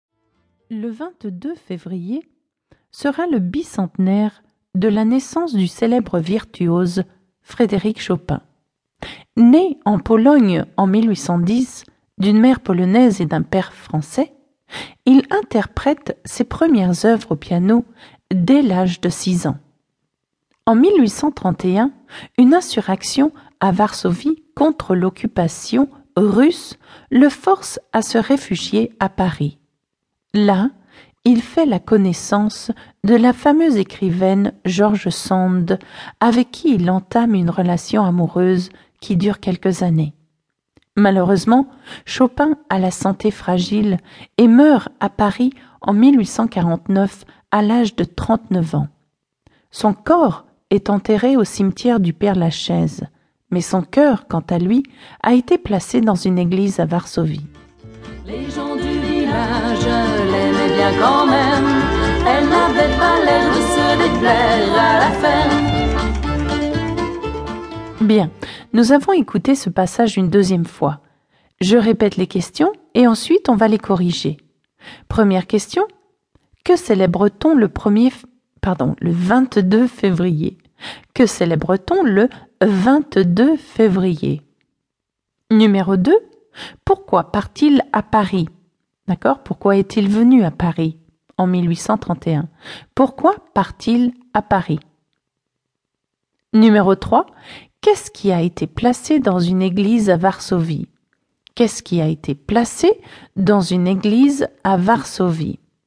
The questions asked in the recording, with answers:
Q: Que célèbre-t-on le 22 février ?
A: On célèbre le bicentenaire de la naissance de Frédéric Chopin.

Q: Pourquoi part-il à Paris ?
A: Il part à cause d'une insurrection à Varsovie contre l'occupation russe.

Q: Qu'est-ce qui a été placé dans une église à Varsovie ?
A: D'accord, son cœur, d'accord ?